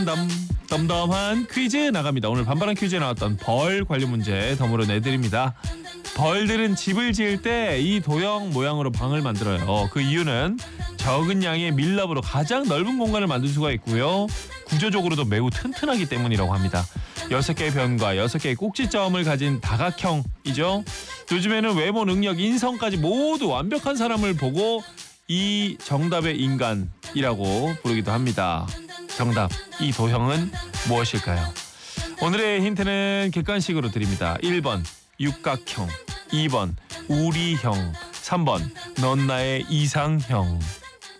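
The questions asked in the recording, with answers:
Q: 정답, 이 도형은 무엇일까요?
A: 1번: 육각형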